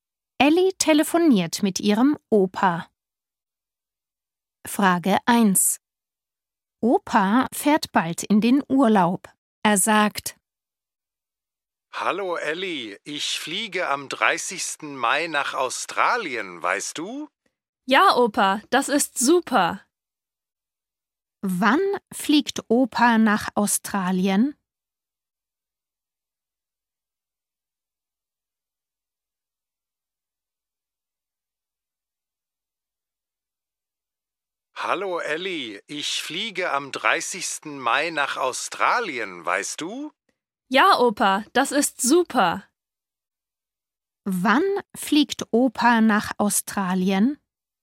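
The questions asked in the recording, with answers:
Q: Wann fliegt Opa nach Australien?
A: am 30. Mai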